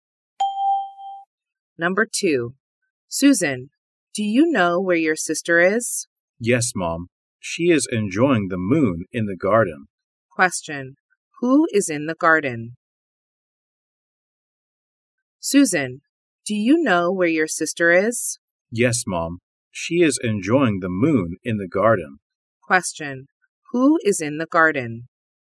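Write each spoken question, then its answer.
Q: Who is in the garden?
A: Susan's sister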